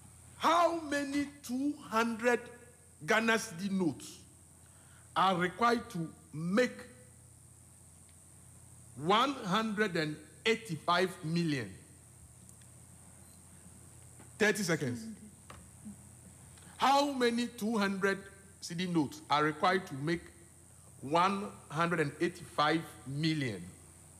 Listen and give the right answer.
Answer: So it's 925,000.